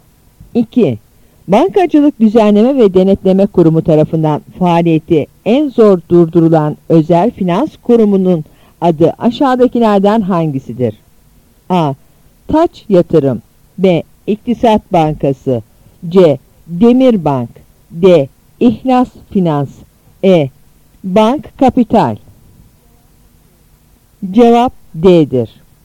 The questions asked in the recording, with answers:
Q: Bankacılık Düzenleme ve Denetleme Kurumu tarafından faaliyeti en zor durdurulan özel finans kurumunun adı aşağıdakilerden hangisidir?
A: Cevap D'dir.